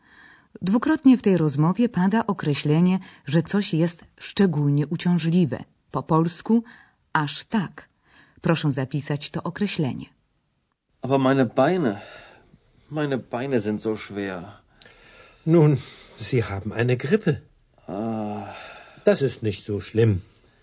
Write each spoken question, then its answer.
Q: Proszę zapisać to określenie.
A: So to niemieckie wyrażenie określające, że coś jest aż tak